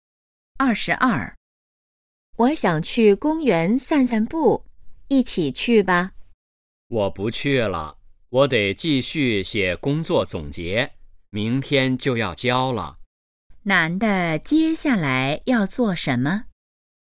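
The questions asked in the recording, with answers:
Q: 男的接下来要做什么?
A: 写工作总结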